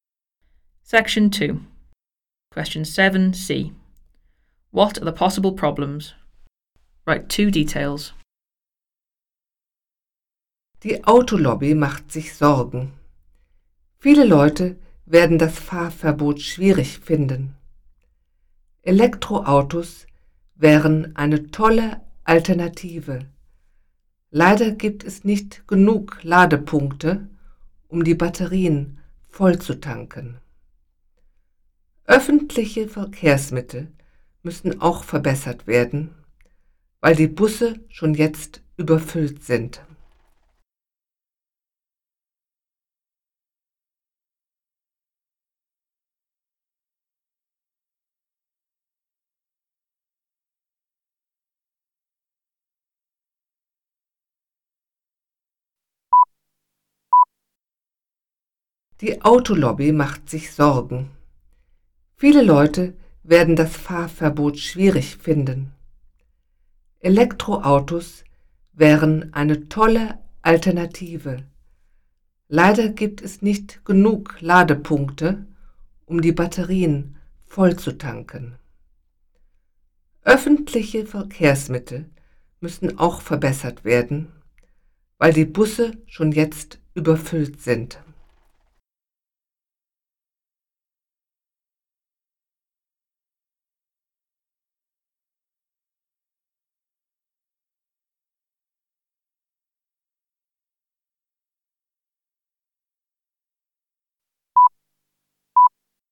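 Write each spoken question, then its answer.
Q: What are the possible problems?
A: Not enough charging points for electric cars; buses already overcrowded; many people will find the ban difficult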